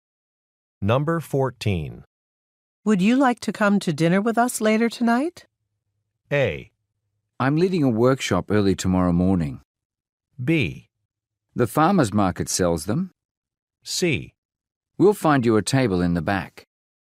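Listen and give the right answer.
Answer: A: I'm leading a workshop early tomorrow morning.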